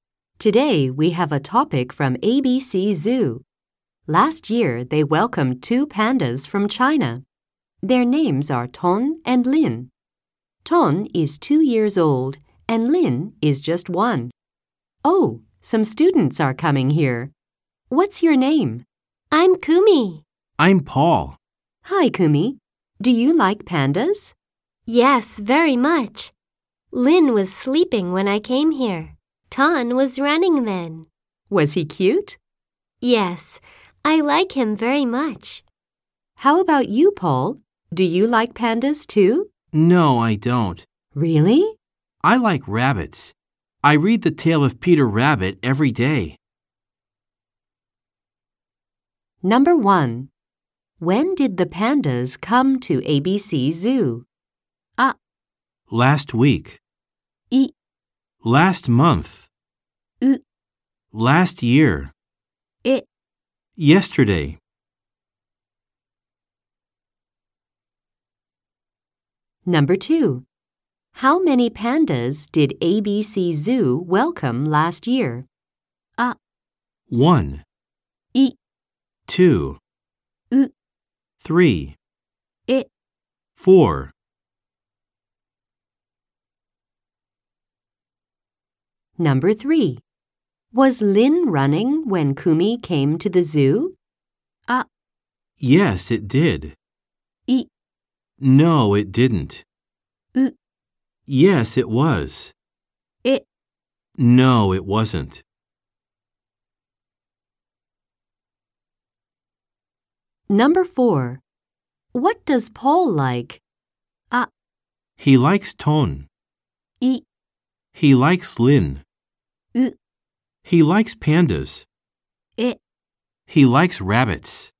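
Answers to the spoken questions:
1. C: Last year.
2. B: 2.
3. D: No, it wasn't.
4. D: He likes rabbits.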